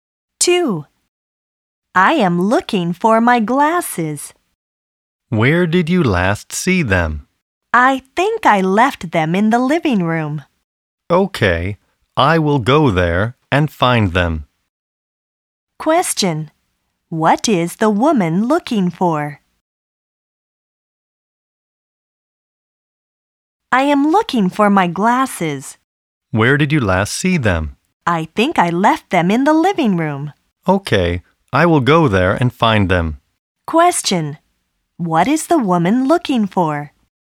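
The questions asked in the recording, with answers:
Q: What is the woman looking for?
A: Her glasses.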